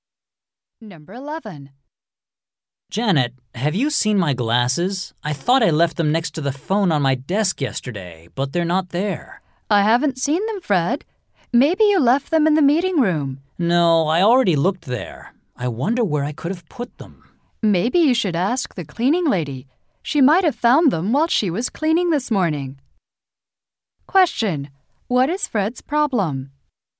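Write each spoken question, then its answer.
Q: What is Fred's problem?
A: He can't find his glasses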